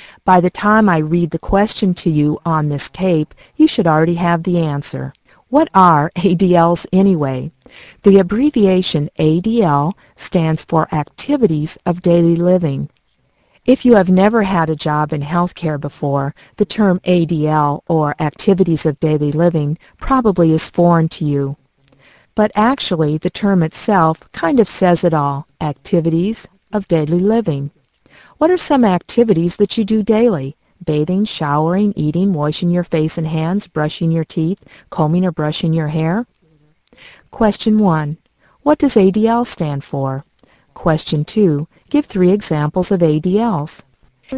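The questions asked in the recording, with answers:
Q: What does ADL stand for?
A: Activities of Daily Living

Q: Give 3 examples of ADLs.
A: Bathing, eating, brushing your teeth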